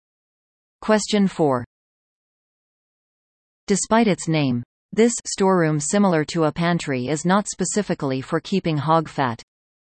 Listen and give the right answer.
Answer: The answer is a larder.